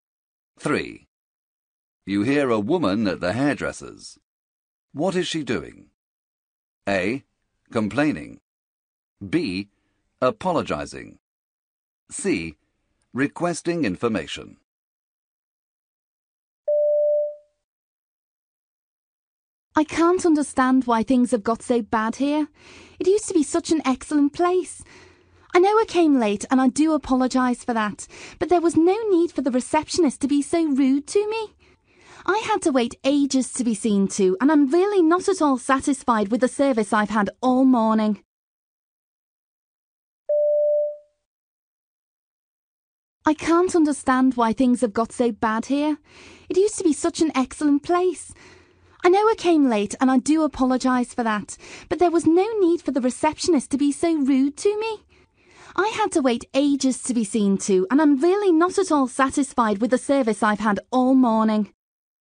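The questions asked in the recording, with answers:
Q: What is she doing?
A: A: Complaining.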